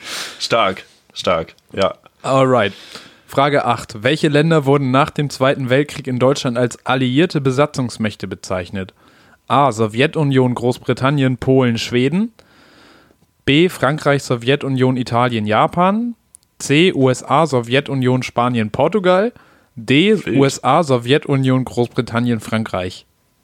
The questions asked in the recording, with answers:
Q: Welche Länder wurden nach dem Zweiten Weltkrieg in Deutschland als alliierte Besatzungsmächte bezeichnet?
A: D. D, ne?